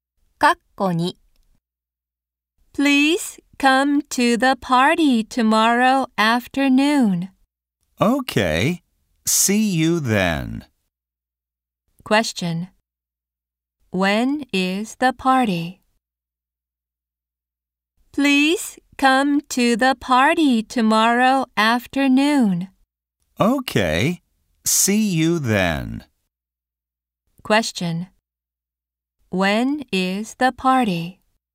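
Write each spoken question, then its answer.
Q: When is the party?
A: Tomorrow afternoon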